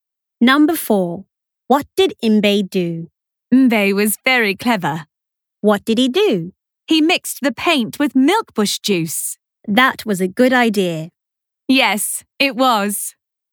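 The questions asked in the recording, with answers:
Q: What did Mbe do?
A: He mixed the paint with milkbush juice.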